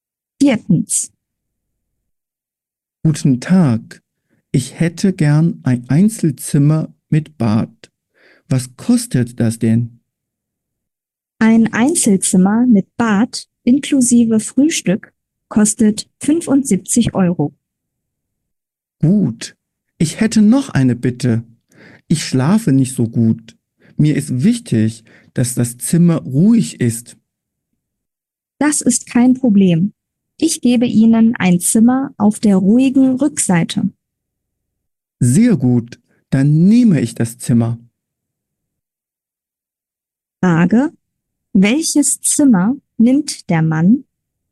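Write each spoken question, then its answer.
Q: Welches Zimmer nimmt der Mann?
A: ein ruhiges Einzelzimmer mit Bad auf der Rückseite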